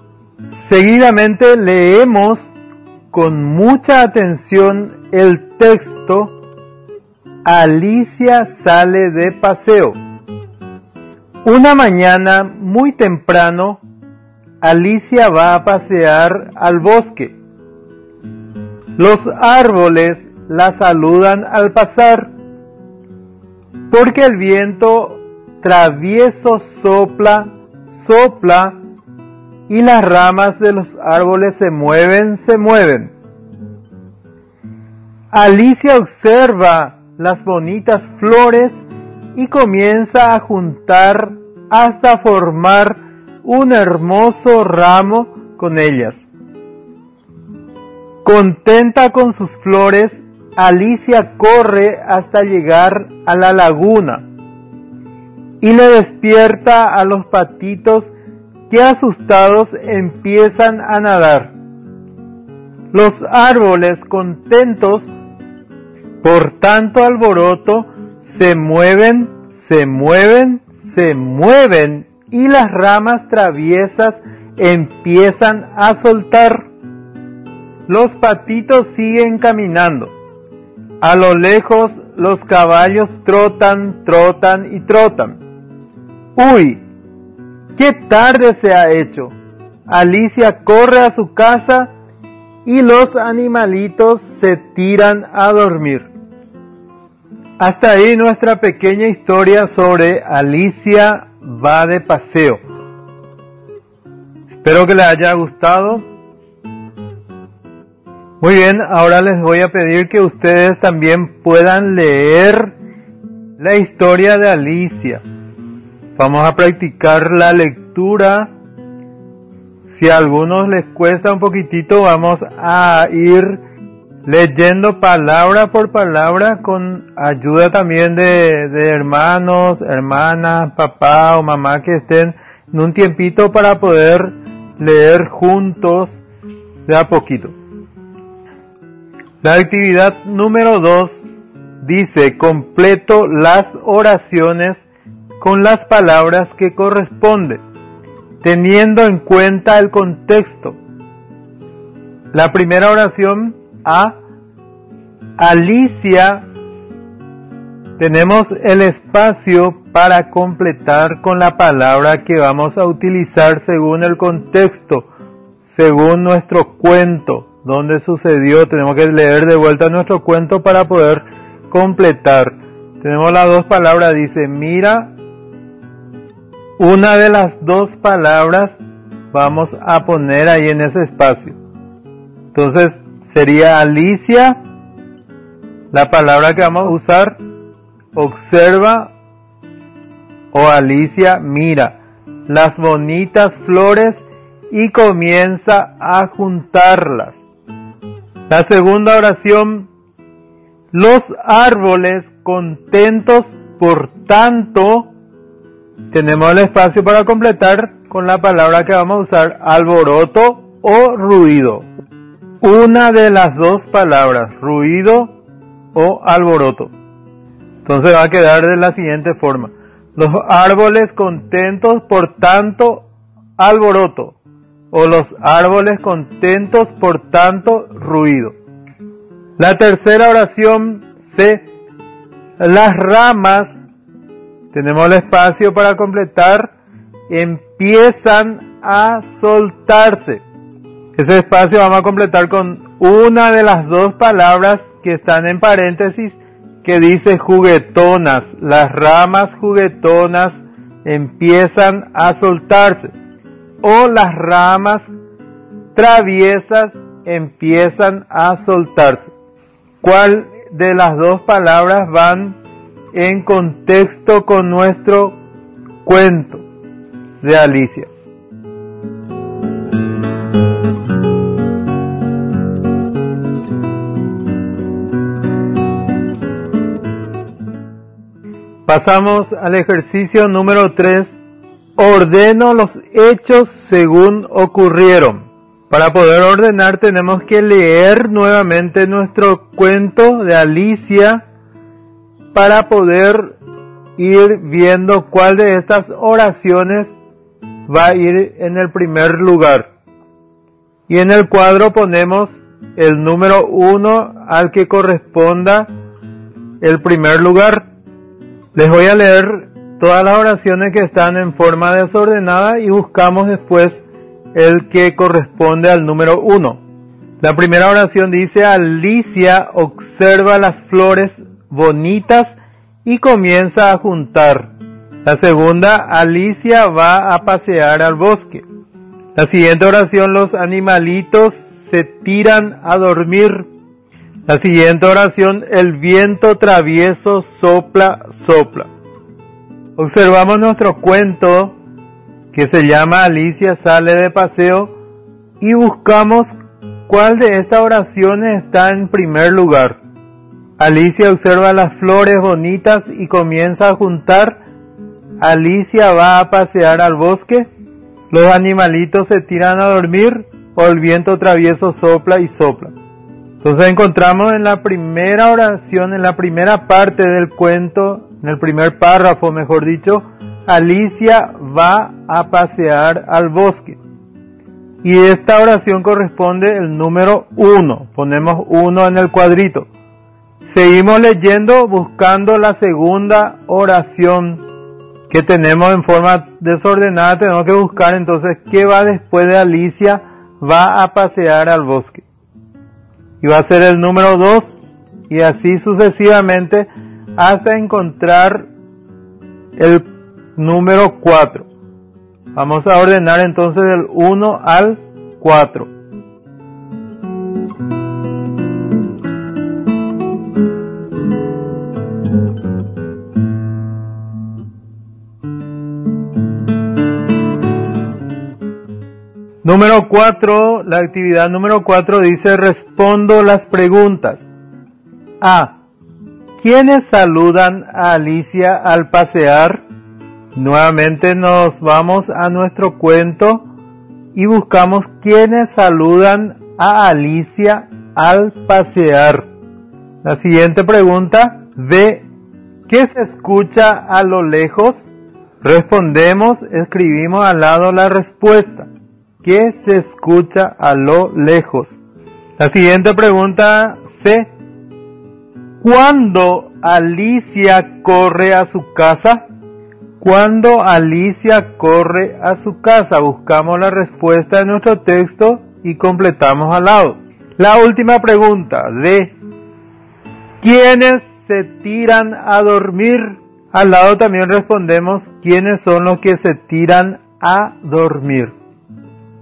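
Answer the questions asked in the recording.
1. Los árboles
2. Los caballos que trotan
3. Cuando se hizo tarde
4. Los animalitos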